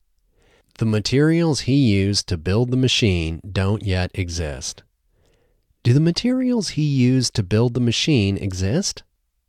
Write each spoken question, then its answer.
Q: Do the materials he used to build the machine exist?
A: No, the materials he used to build the machine don't yet exist.